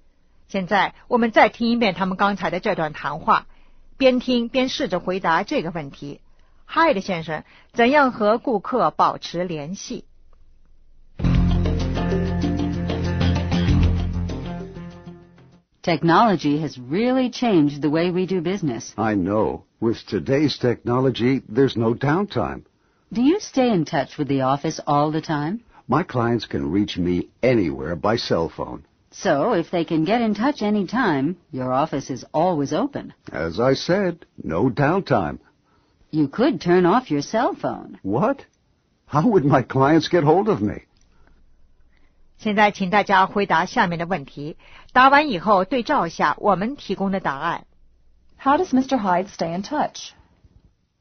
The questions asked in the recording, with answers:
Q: How does Mr. Hyde stay in touch?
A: With a cell phone.